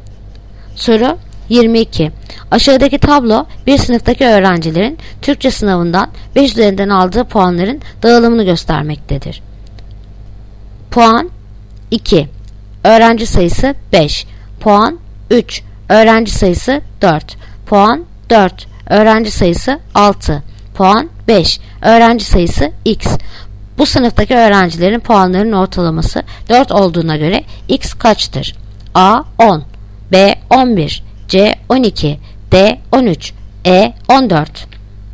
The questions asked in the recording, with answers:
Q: Bu sınıftaki öğrencilerin puanlarının ortalaması 4 olduğuna göre x kaçtır?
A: Yanıt Edirne 14.